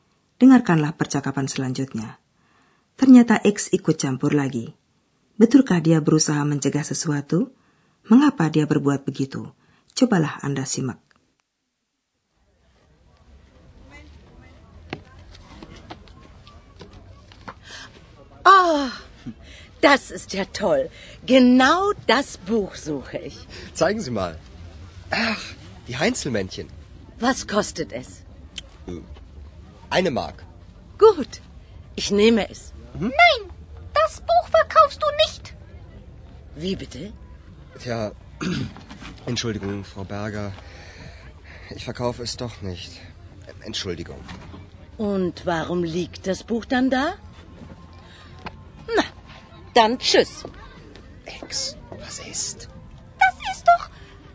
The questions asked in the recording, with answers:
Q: Betulkah dia berusaha mencegah sesuatu?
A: X mencegah penjualan buku tentang kurcaci dari Köln itu.